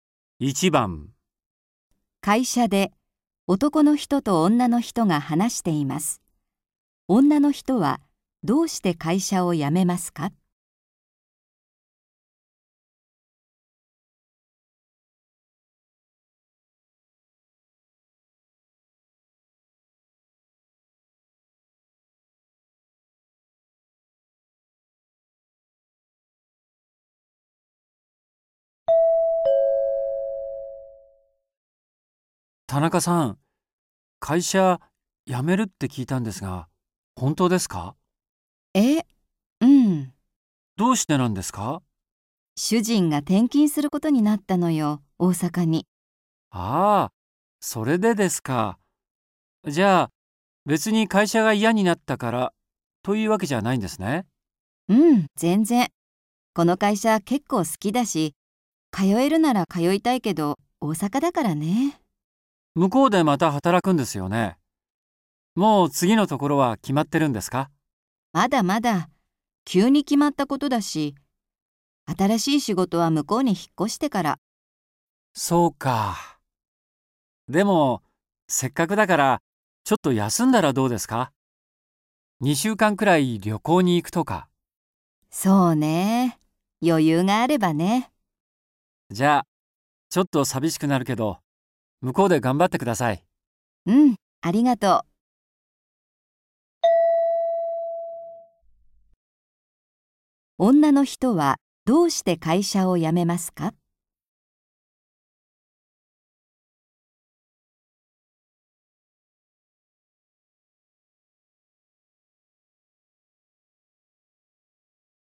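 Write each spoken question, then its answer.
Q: 女の人はどうして会社を辞めますか?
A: ご主人が大阪に転勤することになったから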